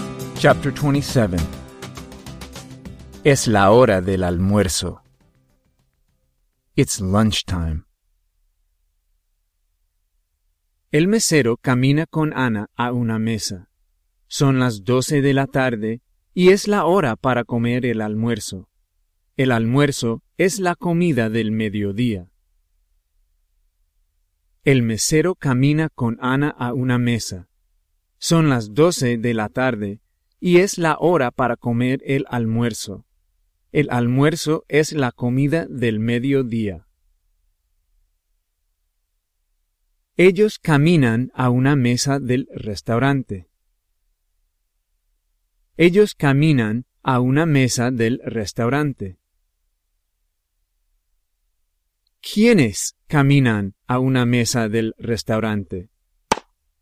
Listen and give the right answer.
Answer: El mesero y Ana caminan a una mesa del restaurante.